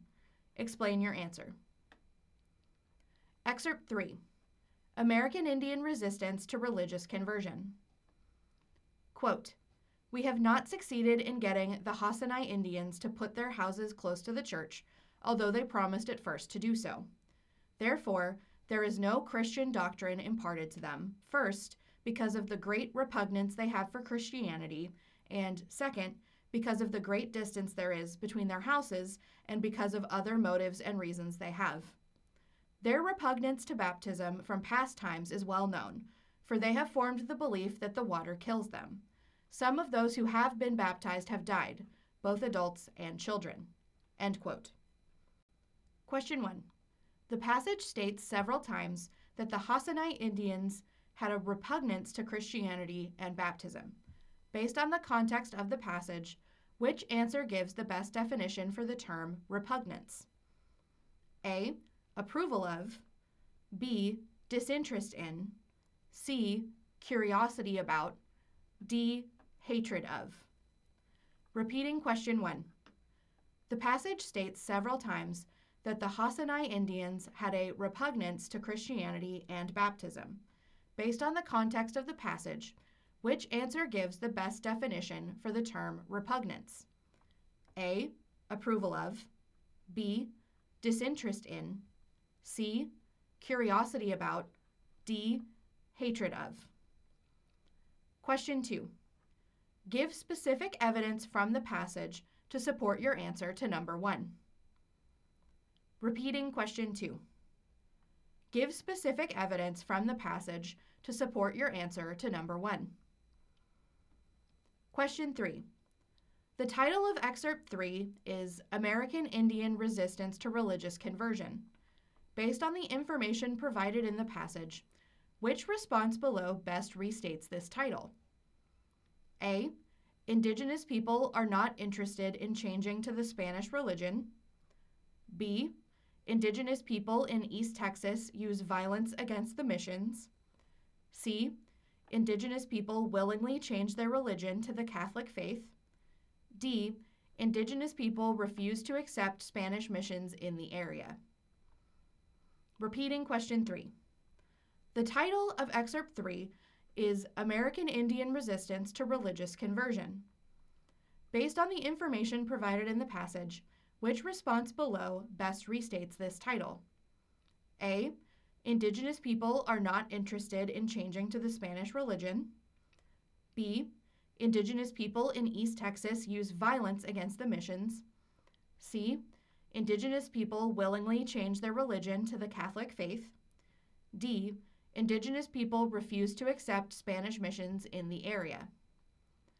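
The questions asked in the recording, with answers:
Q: Based on the context of the passage, which answer gives the best definition for the term repugnance?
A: D: Hatred of.

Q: Based on the information provided in the passage, which response below best restates this title?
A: A: Indigenous people are not interested in changing to the Spanish religion.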